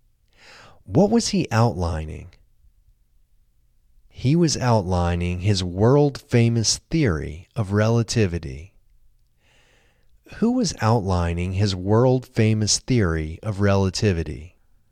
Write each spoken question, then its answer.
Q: Who was outlining his world-famous theory of relativity?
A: Einstein was outlining his world-famous theory of relativity.